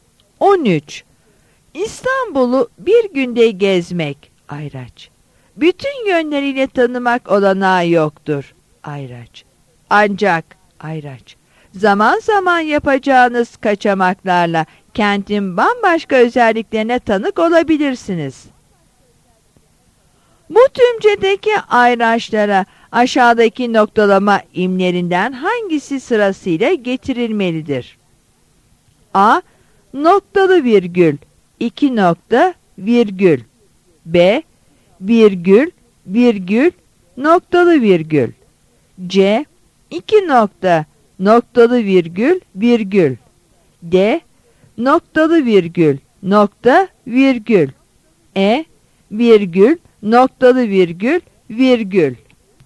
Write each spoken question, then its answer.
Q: Bu tümcedeki Ayraçlara aşağıdaki noktalama imlerinden hangisi sırasıyla getirilmelidir?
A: Yanıt E'dir.